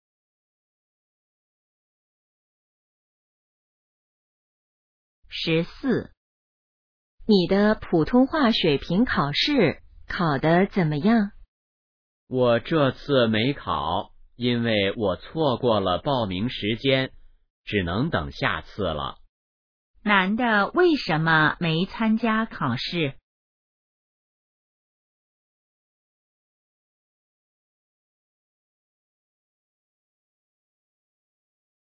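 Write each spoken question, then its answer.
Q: 男的为什么没参加考试?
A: 错过了报名时间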